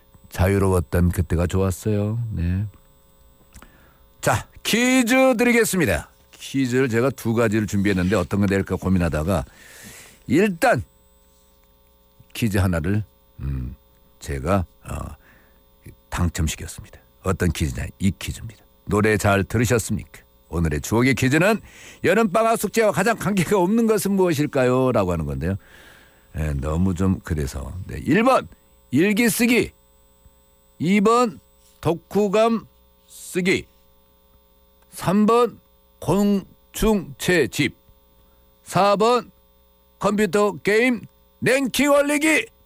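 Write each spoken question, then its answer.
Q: 오늘의 추억의 퀴즈는 여름방학 숙제와 가장 관계가 없는 것은 무엇일까요?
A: 4번: 컴퓨터 게임 랭킹 올리기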